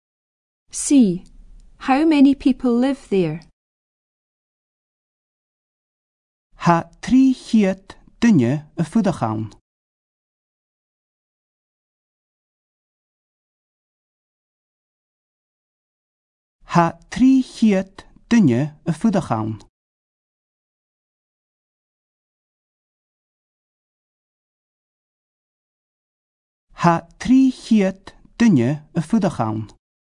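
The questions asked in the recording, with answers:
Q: How many people live there?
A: Three hundred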